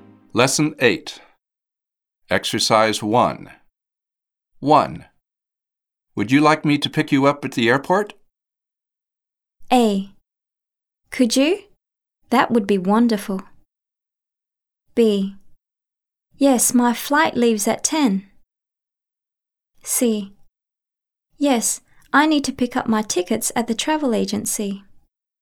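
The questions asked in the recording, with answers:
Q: Would you like me to pick you up at the airport?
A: A: Could you? That would be wonderful.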